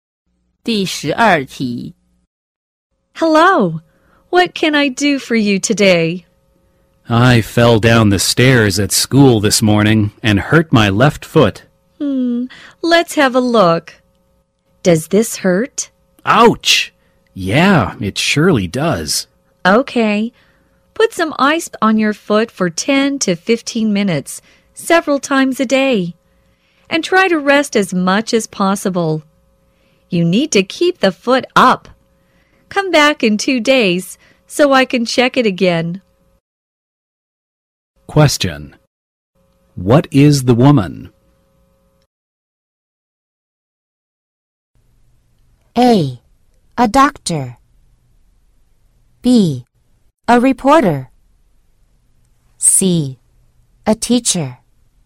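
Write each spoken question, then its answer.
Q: What is the woman?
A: A: A doctor.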